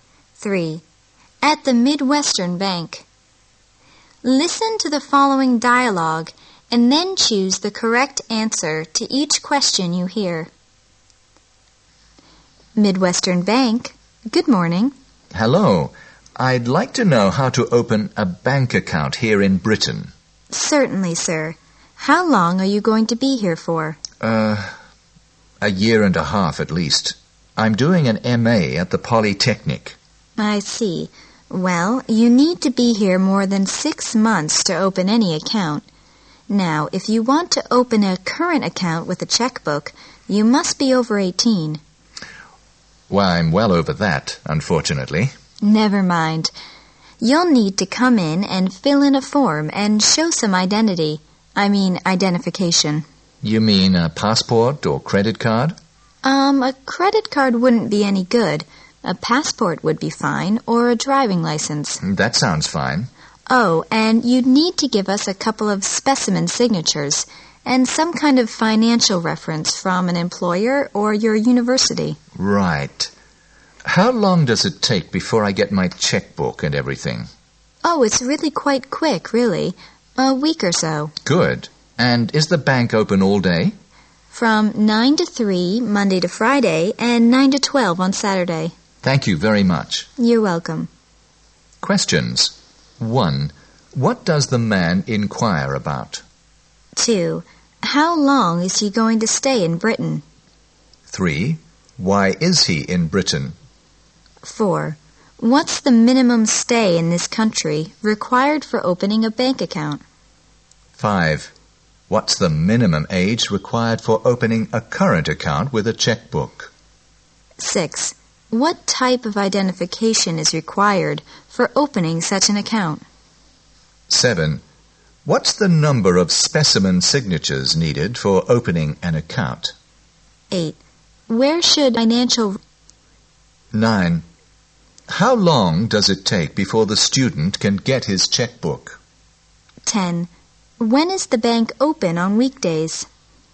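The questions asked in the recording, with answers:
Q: What does the man inquire about?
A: How to open a bank account in Britain

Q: How long is he going to stay in Britain?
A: At least a year and a half

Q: Why is he in Britain?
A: He is doing an MA at the Polytechnic

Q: What's the minimum stay in this country required for opening a bank account?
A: More than 6 months

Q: What's the minimum age required for opening a current account with a checkbook?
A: Over 18

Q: What type of identification is required for opening such an account?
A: A passport or a driving license

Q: What's the number of specimen signatures needed for opening an account?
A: A couple (two)

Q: How long does it take before the student can get his checkbook?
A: About a week

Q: When is the bank open on weekdays?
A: From 9 to 3, Monday to Friday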